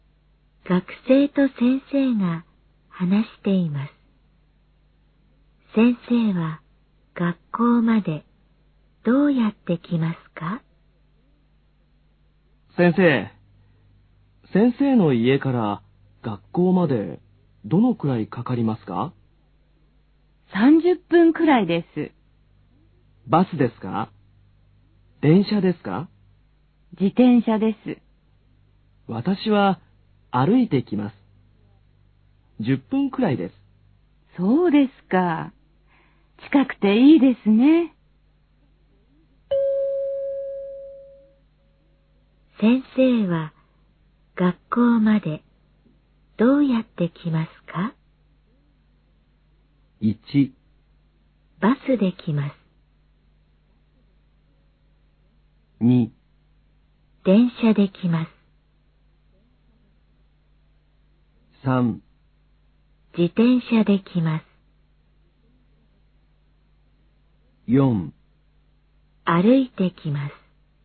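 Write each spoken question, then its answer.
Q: 先生は学校までどうやって来ますか?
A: 3: 自転車で来ます。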